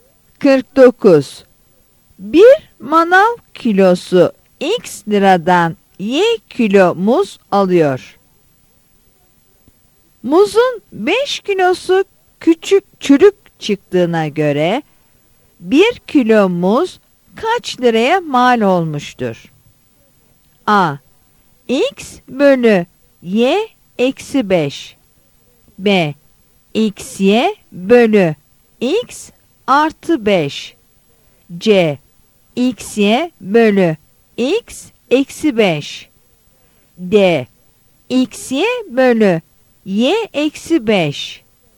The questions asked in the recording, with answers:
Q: Muzun 5 kilosu küçük çürük çıktığına göre 1 kilo muz kaç liraya mal olmuştur?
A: Yanıt D'dir.